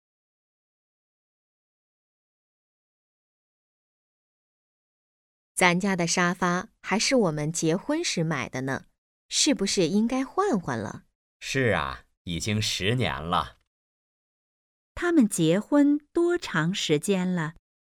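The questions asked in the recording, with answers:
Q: 他们结婚多长时间了?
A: 十年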